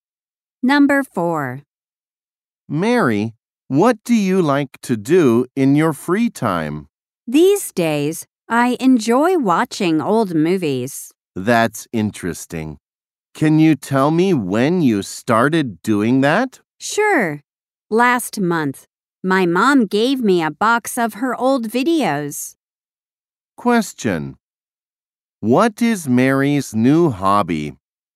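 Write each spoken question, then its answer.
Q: What is Mary's new hobby?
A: Watching old movies.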